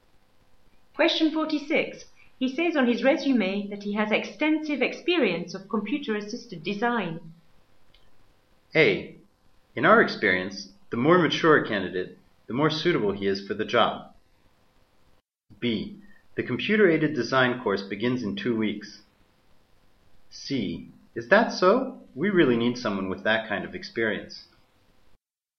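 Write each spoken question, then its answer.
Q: He says on his resume that he has extensive experience of computer-assisted design.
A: C: Is that so? We really need someone with that kind of experience.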